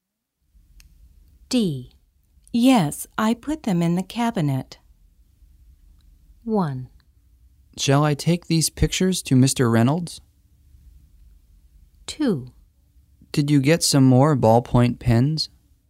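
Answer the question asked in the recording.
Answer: 2: Did you get some more ballpoint pens?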